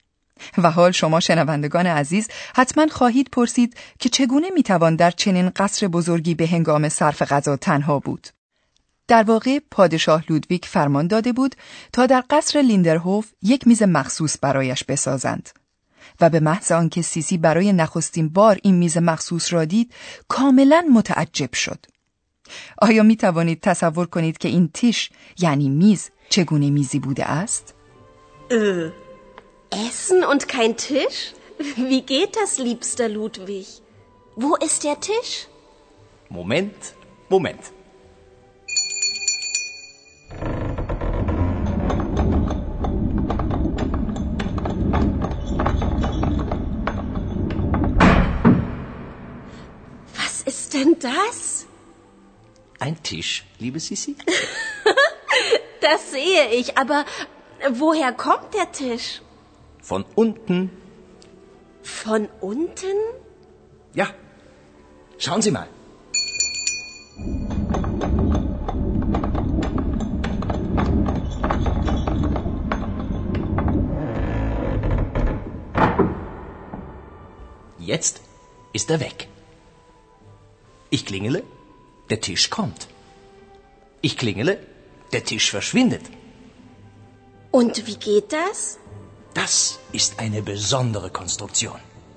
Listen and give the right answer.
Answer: پادشاه لودویگ دوم هم دقیقا از همین شیوه برای ساختن این میز متحرک بهره گرفته بود.